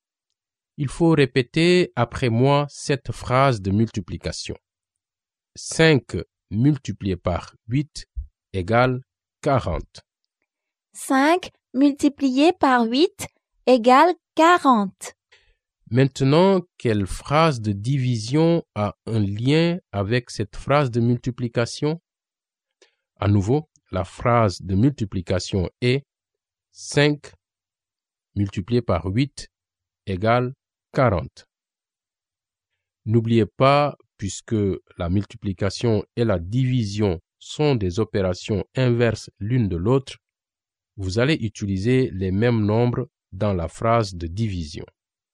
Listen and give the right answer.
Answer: C'est 40 divisé par 8 égale 5?